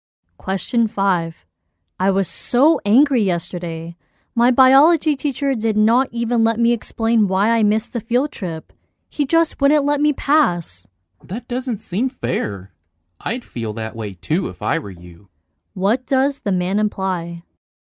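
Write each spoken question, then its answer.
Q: What does the man imply?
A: The teacher was unfair; he understands her anger.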